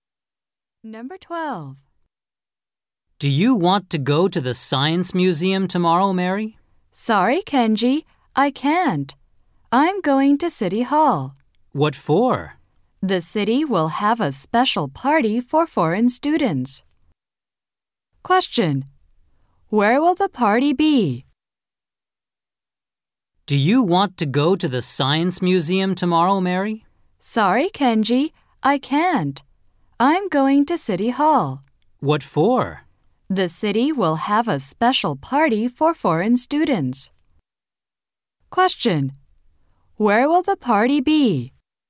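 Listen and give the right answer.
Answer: At City Hall.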